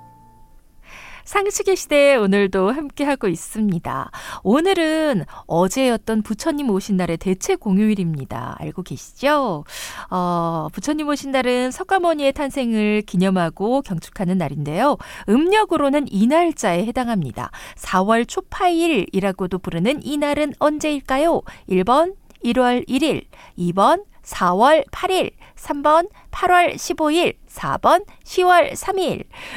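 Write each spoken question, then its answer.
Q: 4월 초파일이라고도 부르는 이 날은 언제일까요?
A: 2: 4월 8일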